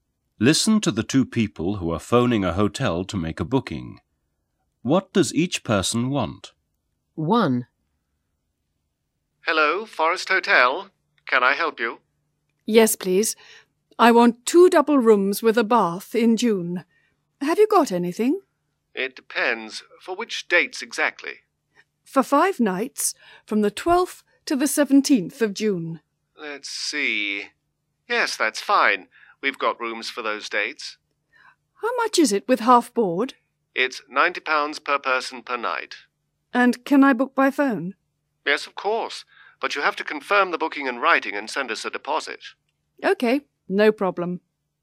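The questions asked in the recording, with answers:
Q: What does each person want?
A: Two double rooms with a bath, half board, for 5 nights from 12th to 17th June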